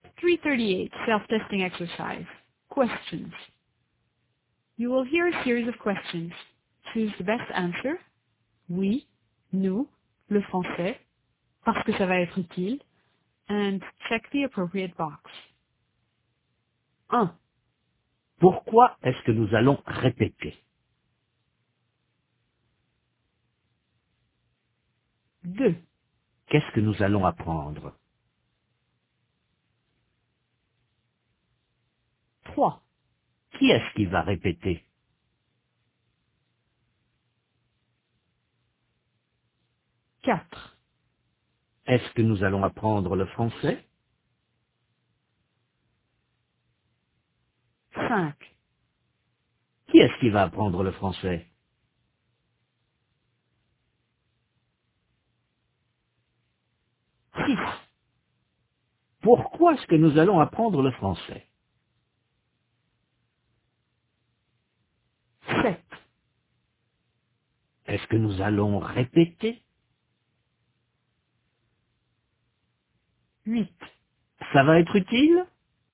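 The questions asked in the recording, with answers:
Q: Pourquoi est-ce que nous allons répéter?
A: parce que ça va être utile

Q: Qu'est-ce que nous allons apprendre?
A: le français

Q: Qui est-ce qui va répéter?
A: nous

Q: Est-ce que nous allons apprendre le français?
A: oui

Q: Qui est-ce qui va apprendre le français?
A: nous

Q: Pourquoi est-ce que nous allons apprendre le français?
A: parce que ça va être utile

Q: Est-ce que nous allons répéter?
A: oui

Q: Ça va être utile?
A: oui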